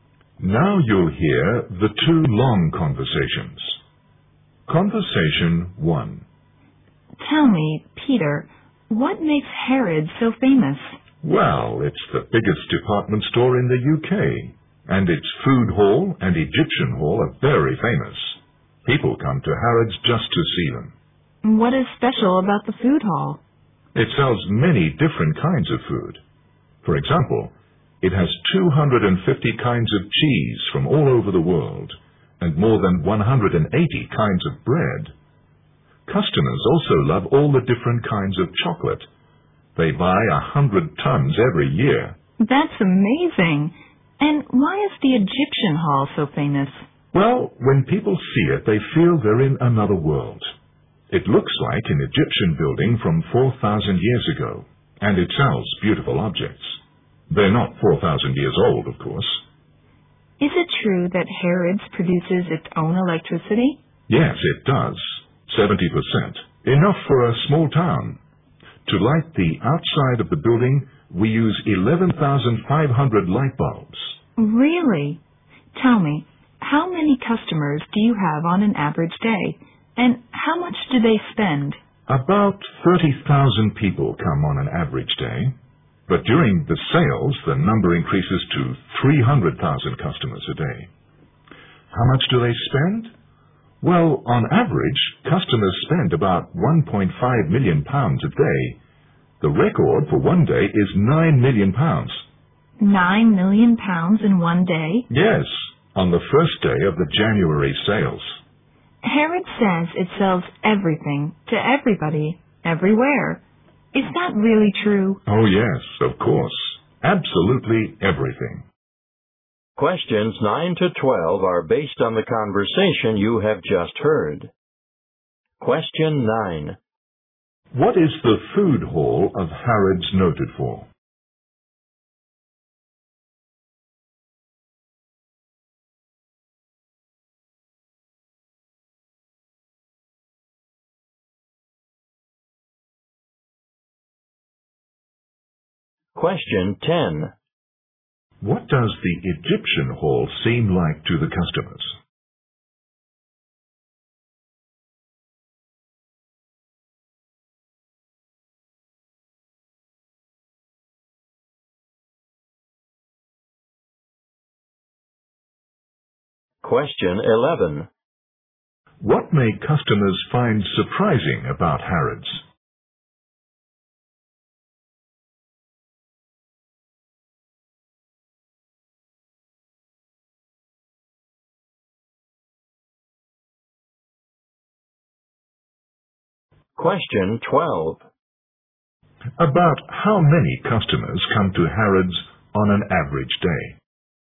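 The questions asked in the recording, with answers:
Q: What is the food hall of Harrods noted for?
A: Its great variety of food.

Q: What does the Egyptian hall seem like to the customers?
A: Like another world: an Egyptian building from 4,000 years ago.

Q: About how many customers come to Harrods on an average day?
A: About 30,000.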